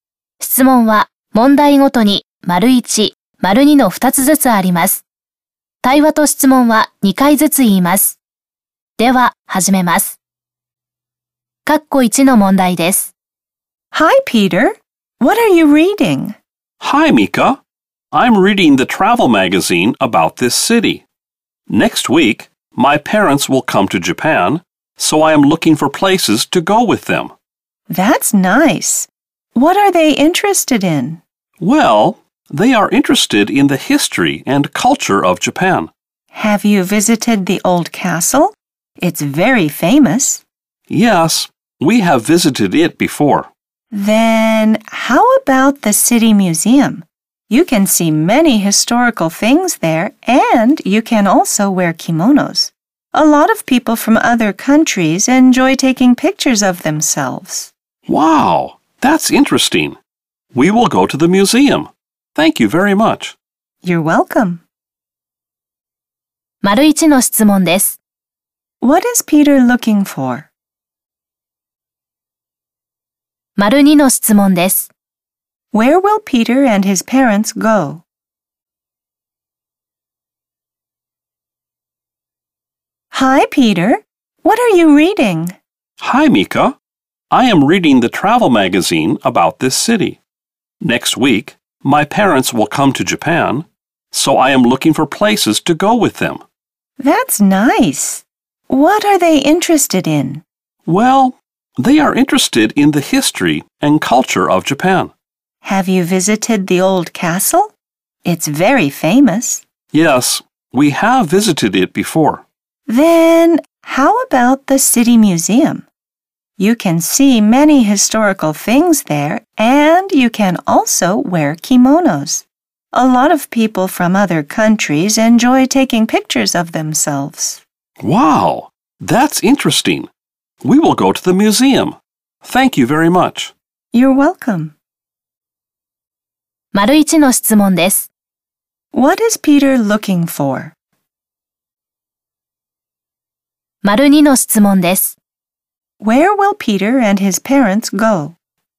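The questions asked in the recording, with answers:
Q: What is Peter looking for?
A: Places to go with his parents.

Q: Where will Peter and his parents go?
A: The city museum.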